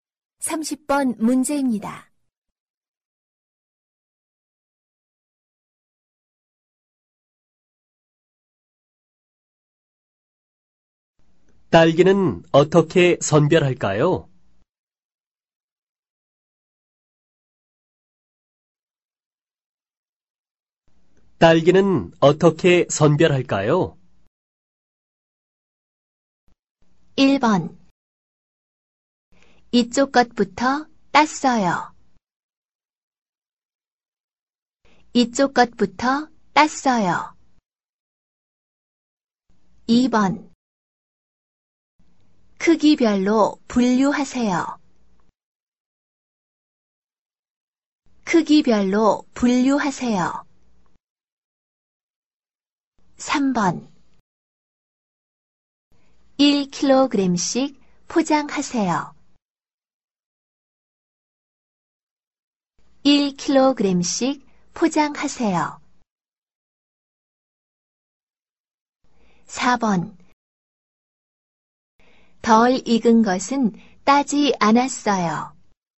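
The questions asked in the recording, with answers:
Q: 딸기는 어떻게 선별할까요?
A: 2: 크기별로 분류하세요.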